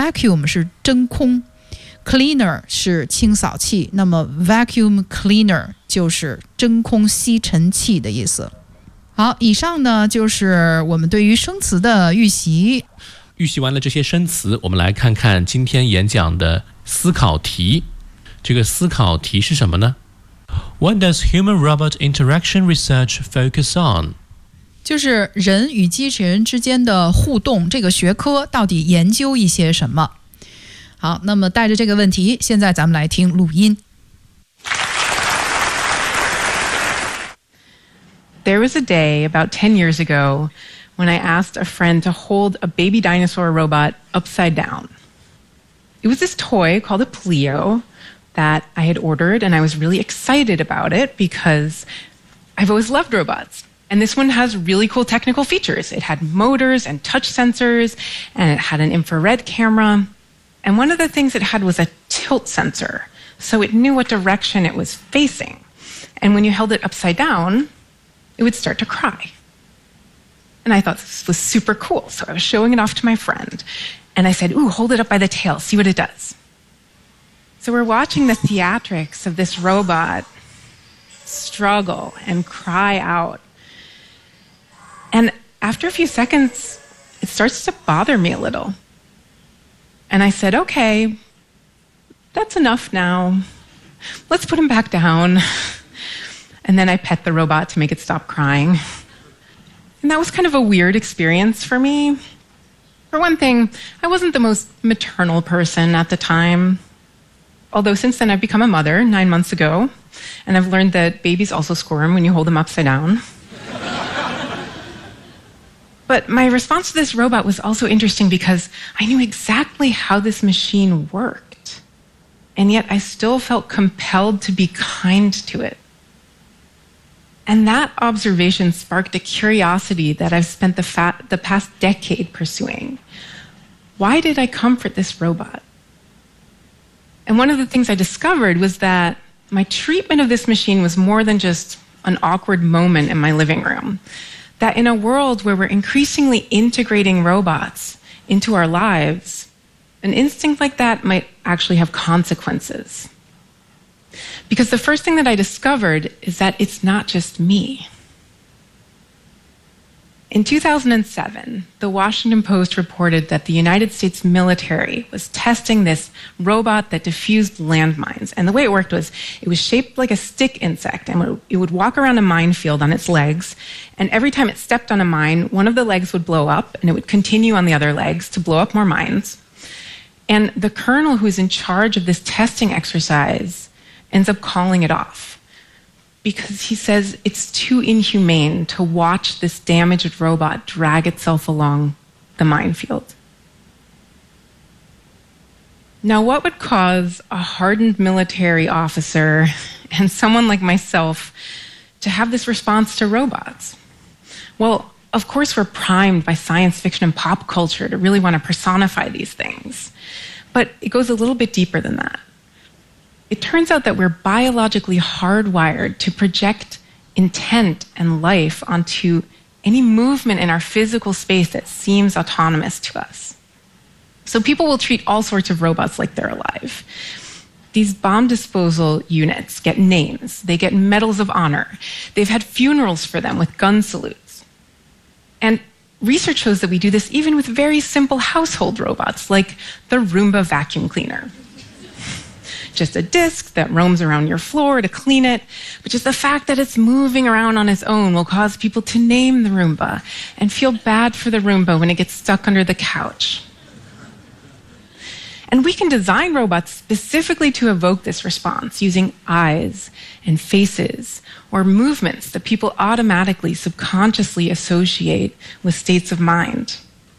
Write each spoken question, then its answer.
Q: What does human-robot interaction research focus on?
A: 有专门的研究就叫做人与机器人之间的互动。那这个研究呢,就是去显示通过眼神、脸部表情来制作的这个设计的这个机器人到底对于人类的情感有什么样的效果。